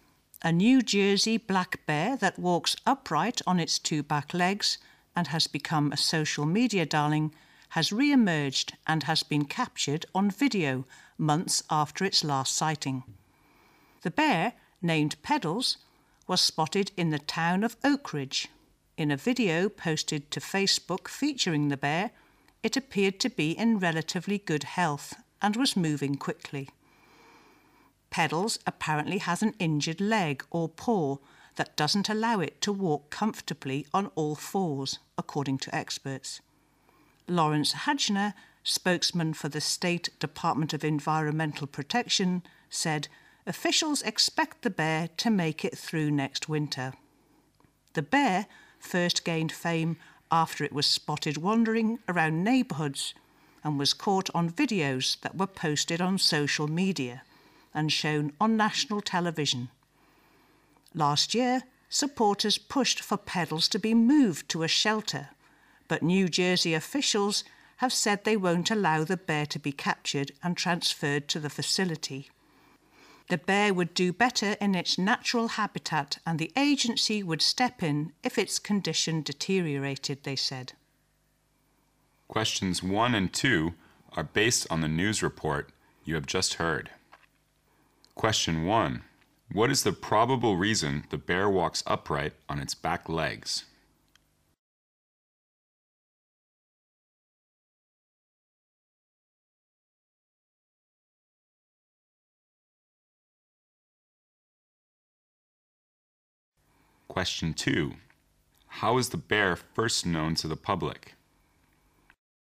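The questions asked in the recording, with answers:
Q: What is the probable reason the bear walks upright on its back legs?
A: It has an injured leg or paw

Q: How is the bear first known to the public?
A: Through videos posted on social media and shown on national television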